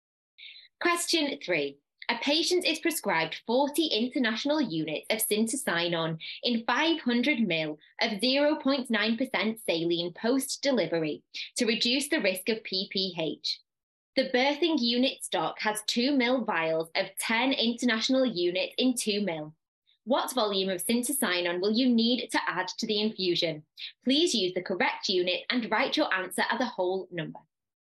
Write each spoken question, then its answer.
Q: What volume of syntocinon will you need to add to the infusion?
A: you're going to add 8 mils to the infusion